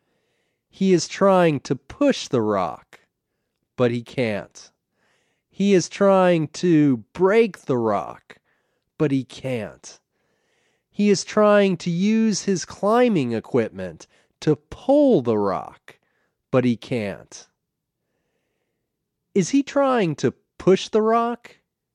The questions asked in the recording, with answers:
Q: Is he trying to push the rock?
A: Yes, he's trying to push the rock.